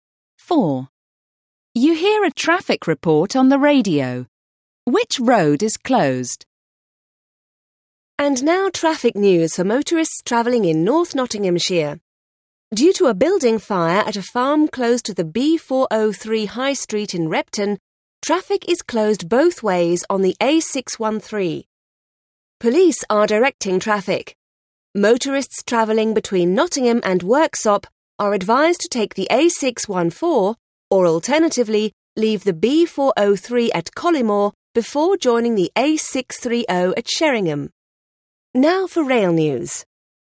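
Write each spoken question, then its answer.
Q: Which road is closed?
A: The A613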